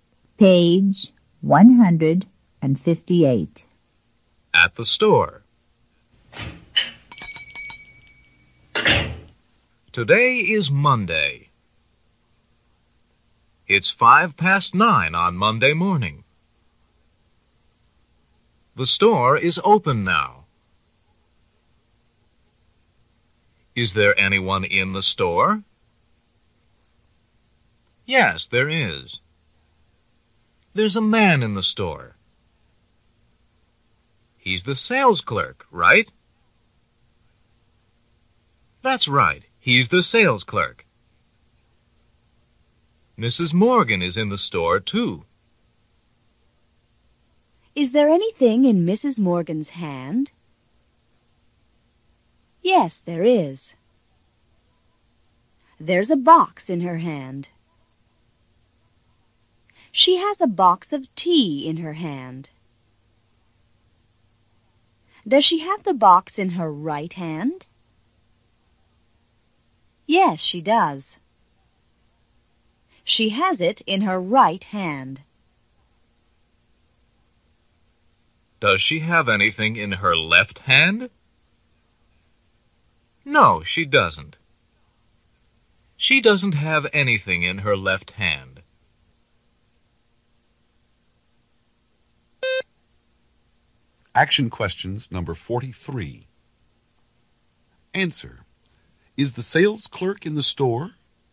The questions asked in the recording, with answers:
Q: Is the sales clerk in the store?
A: Yes, he is.